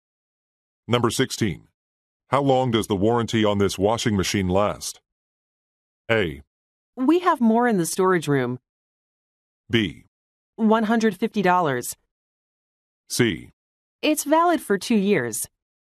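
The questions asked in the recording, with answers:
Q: How long does the warranty on this washing machine last?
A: C: It's valid for 2 years.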